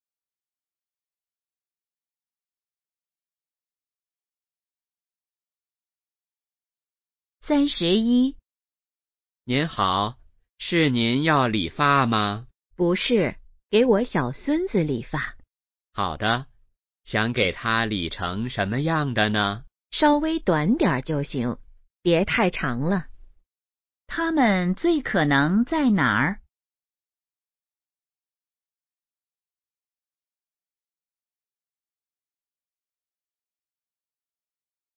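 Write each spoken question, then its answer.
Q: 它们最可能在哪儿?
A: 理发店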